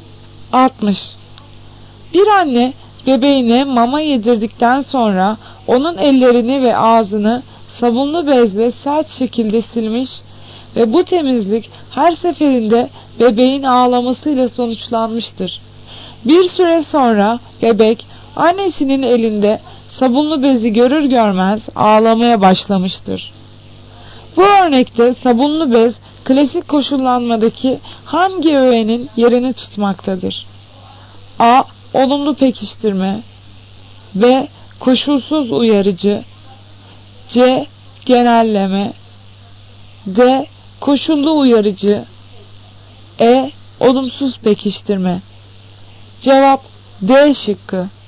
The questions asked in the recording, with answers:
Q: Bu örnekte sabunlu bez klasik koşullanmadaki hangi öğenin yerini tutmaktadır?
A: Cevap D şıkkı. Koşullu uyarıcı.